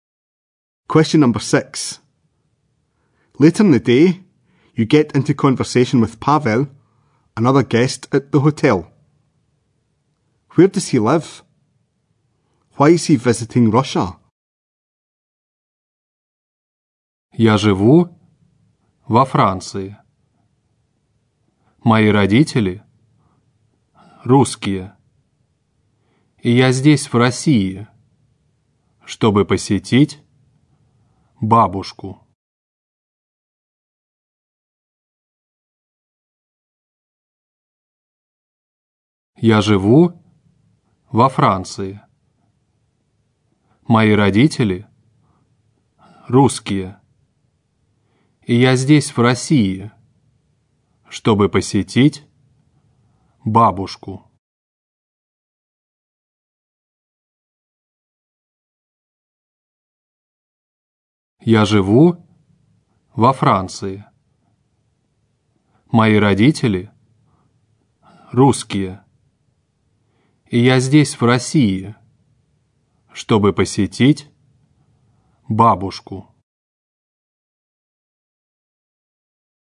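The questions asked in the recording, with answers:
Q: Where does he live?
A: In France

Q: Why is he visiting Russia?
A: To visit his grandmother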